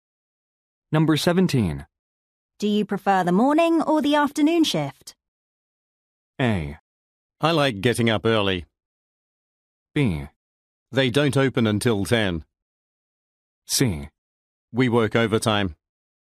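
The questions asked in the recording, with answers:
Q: Do you prefer the morning or the afternoon shift?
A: A: I like getting up early.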